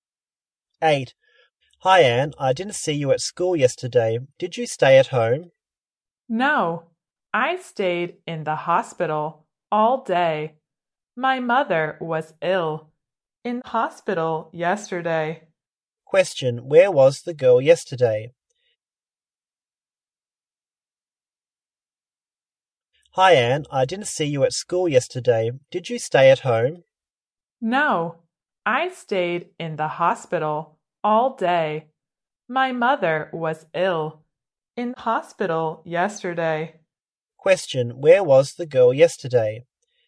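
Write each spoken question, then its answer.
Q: Where was the girl yesterday?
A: In the hospital.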